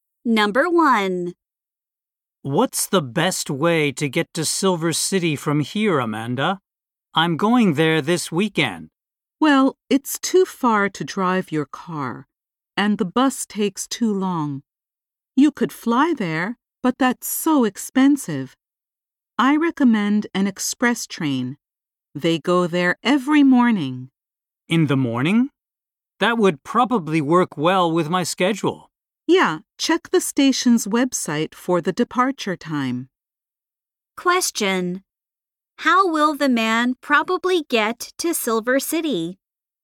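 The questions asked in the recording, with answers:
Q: How will the man probably get to Silver City?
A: By express train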